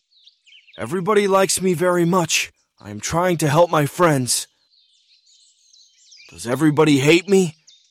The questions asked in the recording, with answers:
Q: Does everybody hate me?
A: No, everybody likes me very much.